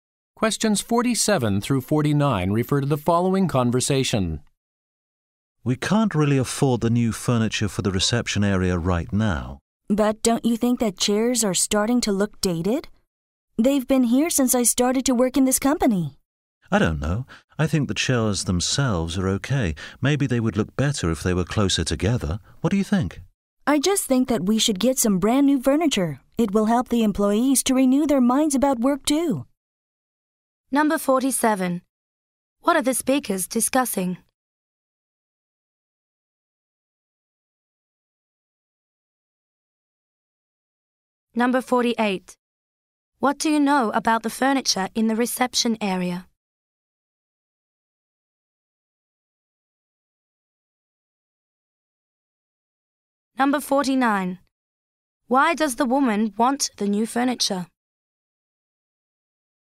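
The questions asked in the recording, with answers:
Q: What are the speakers discussing?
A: New furniture for the reception area

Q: What do you know about the furniture in the reception area?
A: It is old and looks dated

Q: Why does the woman want the new furniture?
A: To help employees renew their minds about work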